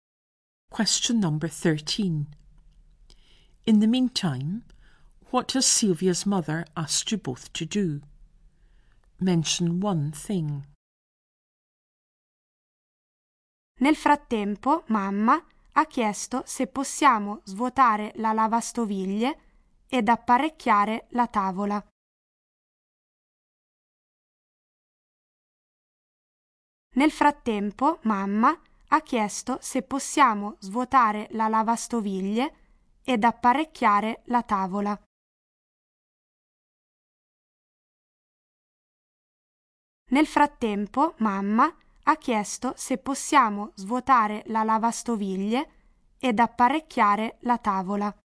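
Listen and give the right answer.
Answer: Empty the dishwasher and set the table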